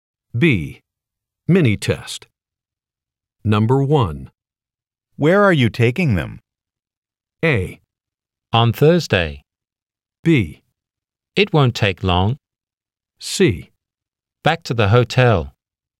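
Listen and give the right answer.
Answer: C: Back to the hotel.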